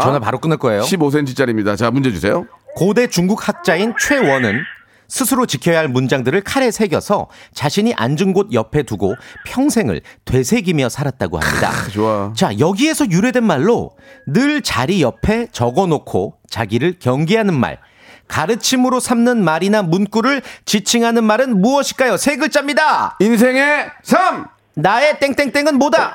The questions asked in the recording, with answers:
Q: 가르침으로 삼는 말이나 문구를 지칭하는 말은 무엇일까요?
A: 좌우명요 정답!